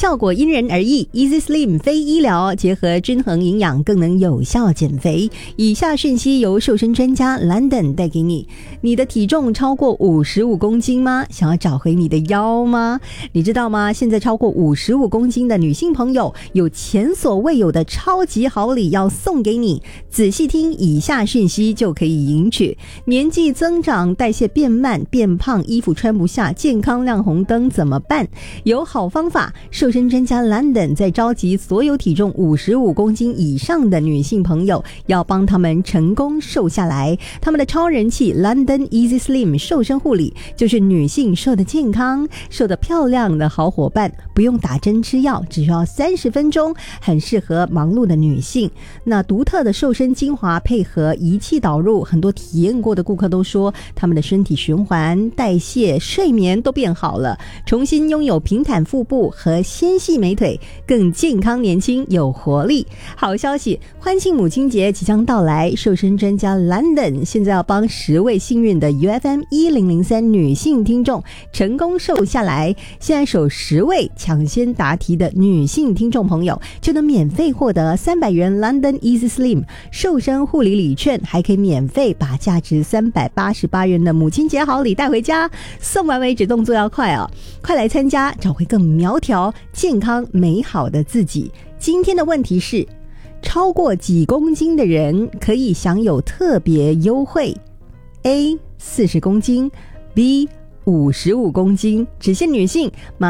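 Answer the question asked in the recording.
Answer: B: 55公斤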